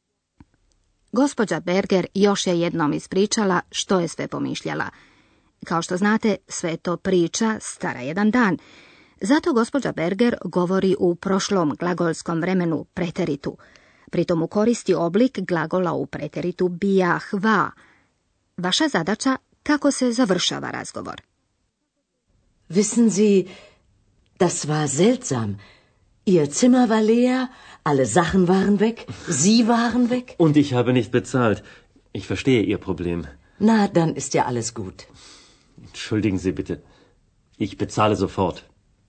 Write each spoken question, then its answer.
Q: Vaša zadaća kako se završava razgovor.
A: Vjerojatno ste razumjeli da gospodin Majer želi platiti.